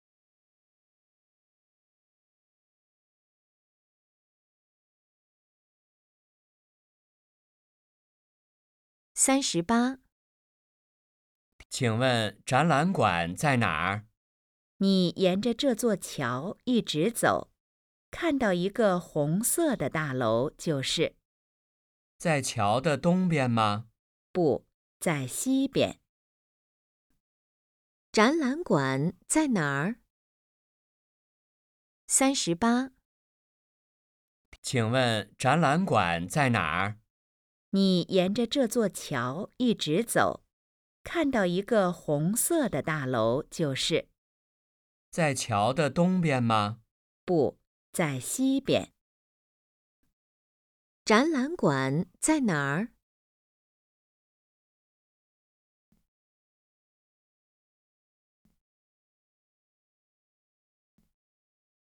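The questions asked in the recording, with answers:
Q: 展览馆在哪儿?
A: 桥的西边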